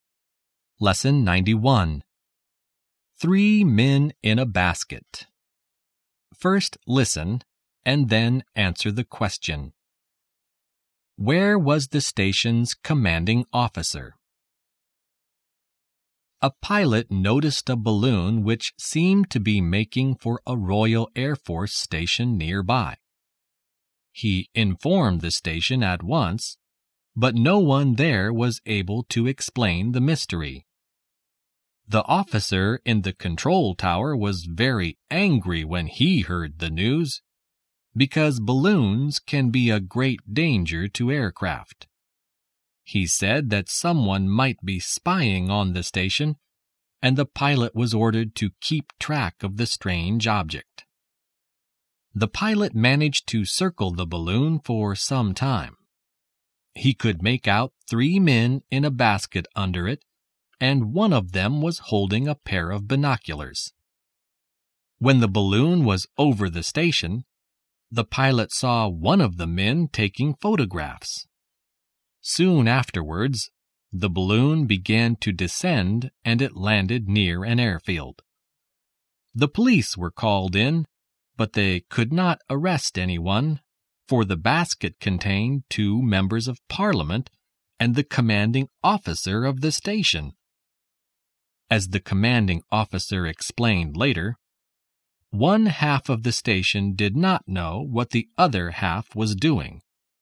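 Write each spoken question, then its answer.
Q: Where was the station's commanding officer?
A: In the balloon's basket, with two members of parliament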